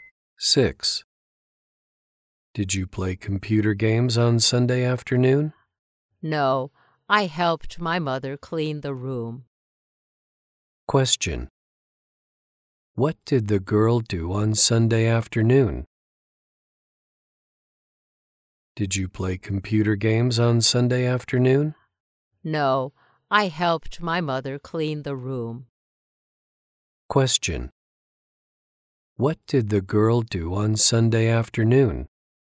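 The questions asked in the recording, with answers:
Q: What did the girl do on Sunday afternoon?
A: She helped her mother clean the room.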